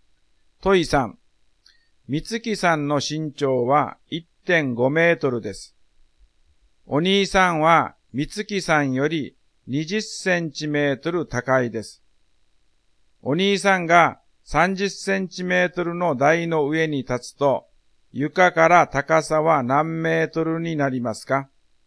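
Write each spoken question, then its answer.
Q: お兄さんが30センチメートルの台の上に立つと、床から高さは何メートルになりますか?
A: 2メートル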